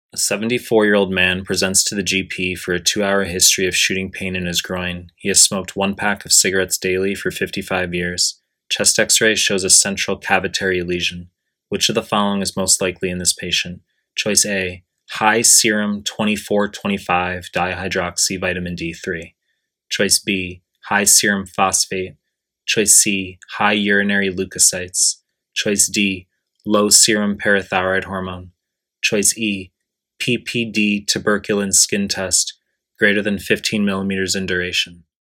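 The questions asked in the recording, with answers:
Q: Which of the following is most likely in this patient?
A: D: low serum parathyroid hormone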